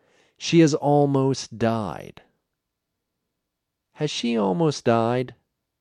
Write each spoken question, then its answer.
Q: Has she almost died?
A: Yes, she has almost died.